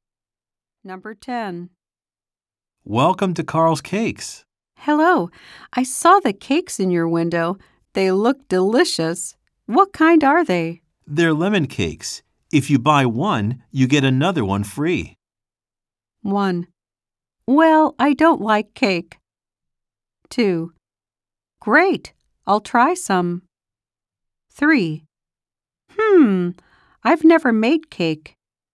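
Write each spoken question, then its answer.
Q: They're lemon cakes. If you buy one, you get another one free.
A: 2: Great. I'll try some.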